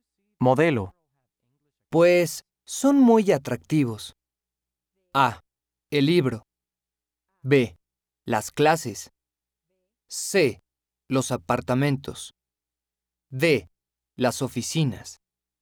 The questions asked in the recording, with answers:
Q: Pues, son muy atractivos.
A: Los apartamentos. Letter C is correct.